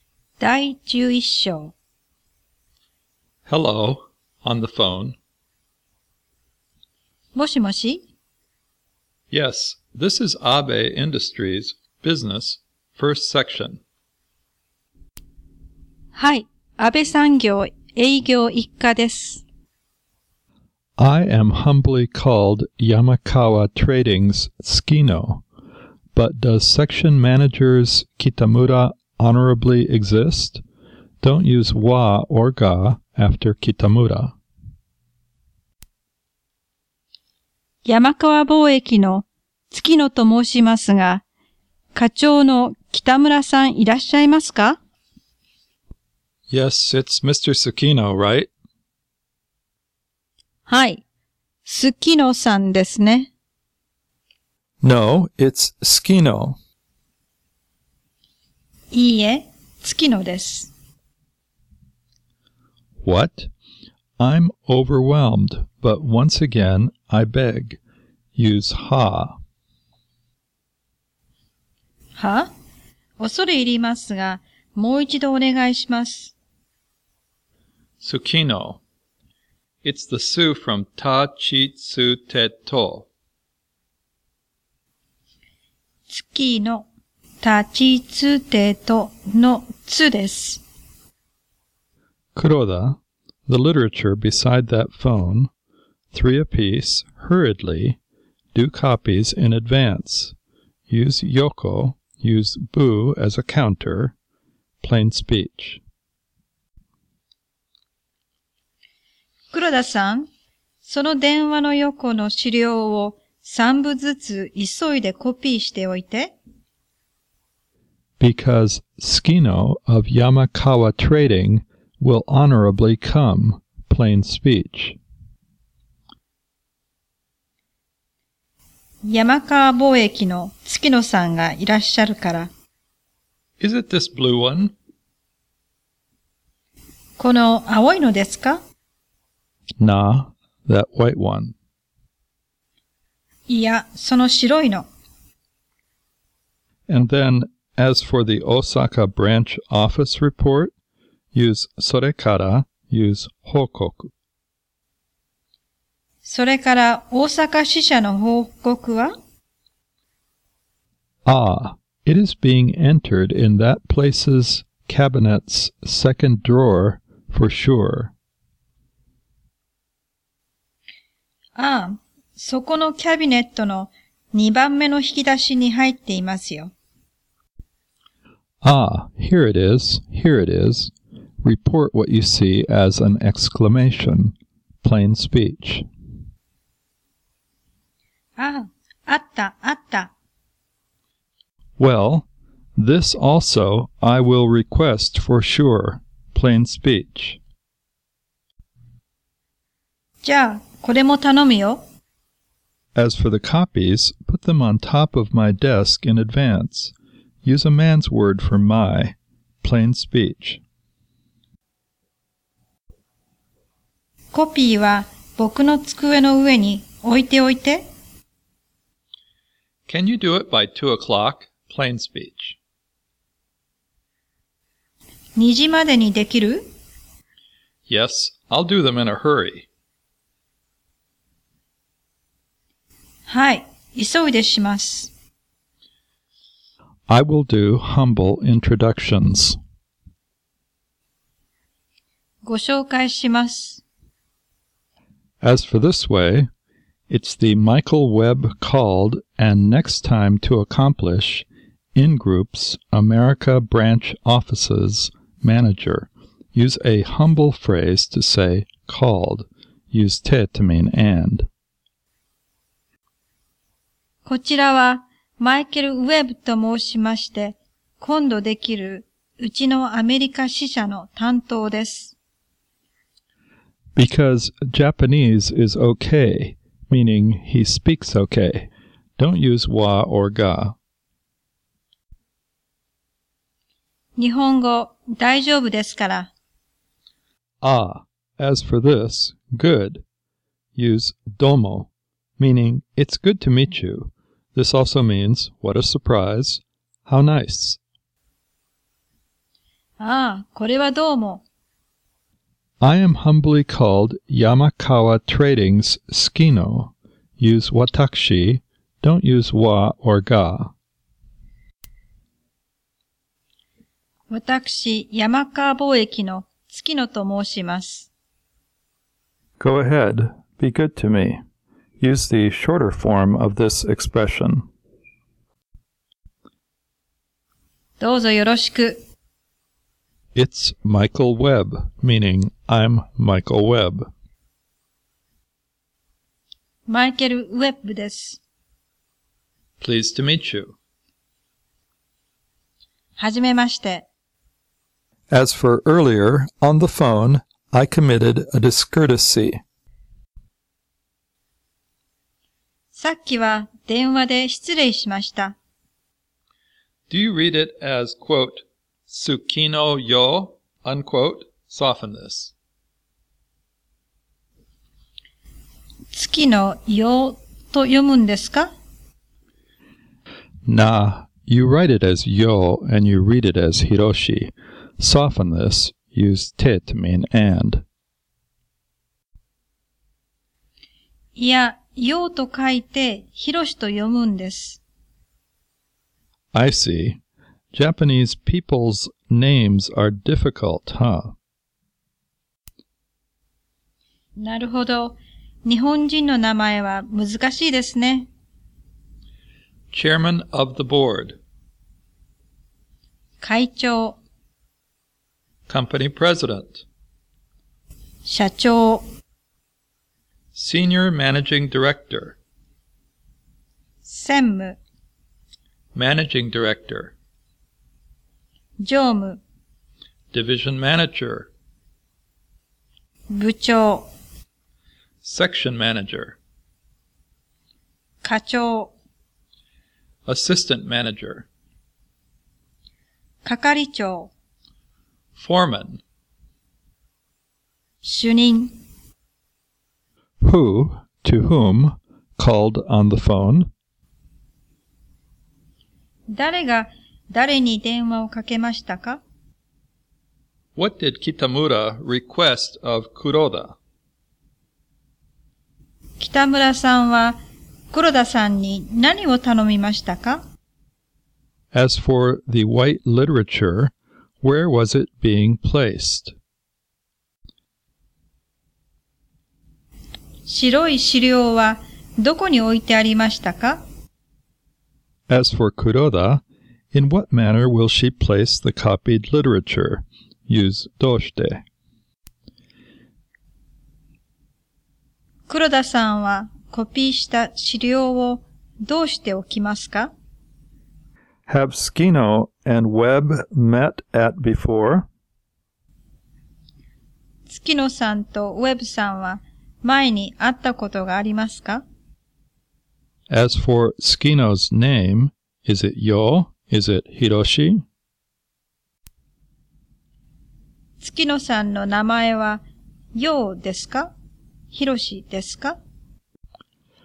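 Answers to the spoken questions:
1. 山川貿易の月野さんが安倍産業の北村課長に電話をかけました。
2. 電話の横の資料と大阪支社の報告を三部ずつ急いでコピーしておくこと。
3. 電話の横に置いてありました。
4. 北村さんの机の上に置いておきます。
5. いいえ、会ったことがありません。
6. ヒロシです。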